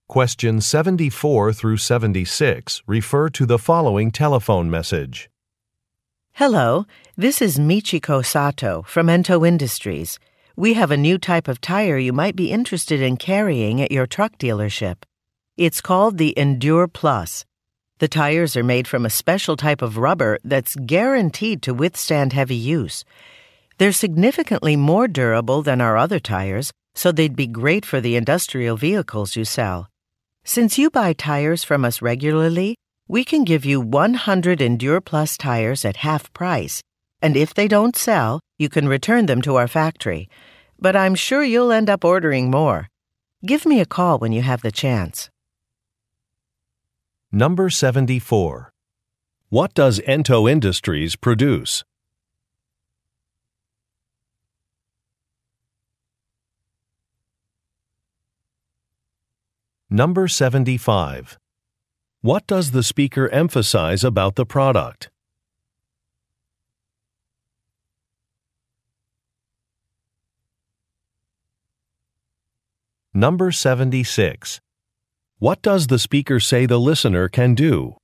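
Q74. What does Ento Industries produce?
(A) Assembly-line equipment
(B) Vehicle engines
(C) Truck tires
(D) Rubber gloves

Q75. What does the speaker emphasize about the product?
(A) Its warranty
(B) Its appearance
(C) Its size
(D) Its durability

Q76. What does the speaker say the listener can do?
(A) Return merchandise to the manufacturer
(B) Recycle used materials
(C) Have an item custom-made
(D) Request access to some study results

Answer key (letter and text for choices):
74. (C) Truck tires
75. (D) Its durability
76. (A) Return merchandise to the manufacturer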